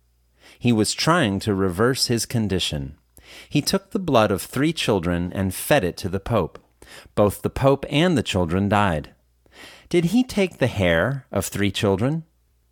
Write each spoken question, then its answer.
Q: Did he take the hair of three children?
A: No, he didn't take the hair of three children.